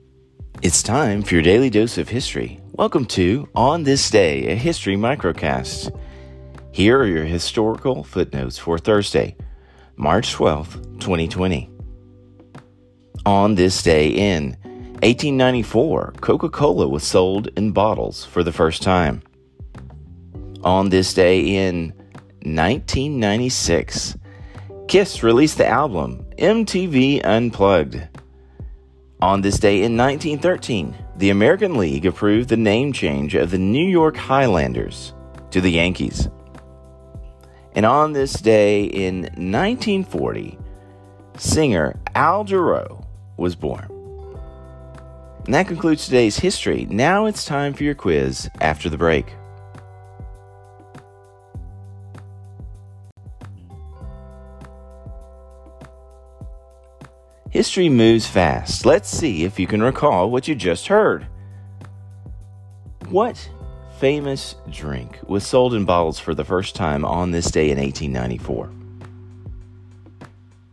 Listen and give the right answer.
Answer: Answer, Coca-Cola.